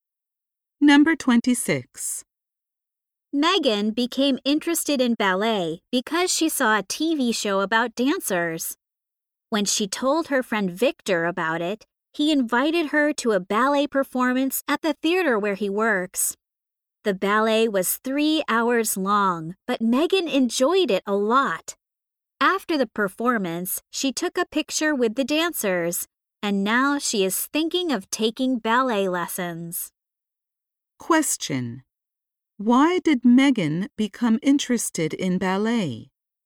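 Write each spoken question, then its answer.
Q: Why did Megan become interested in ballet?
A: She saw a TV show about dancers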